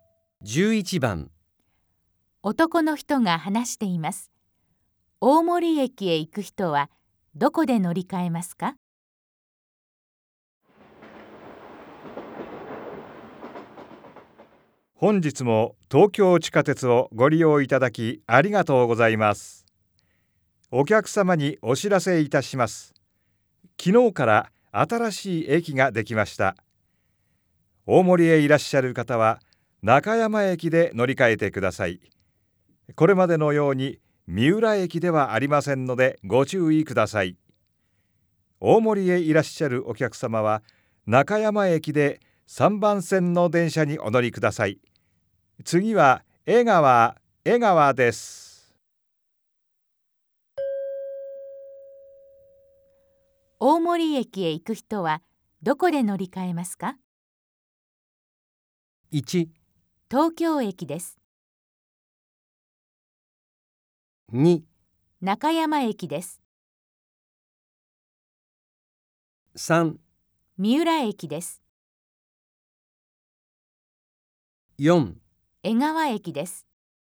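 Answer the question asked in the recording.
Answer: 2: 中山駅です。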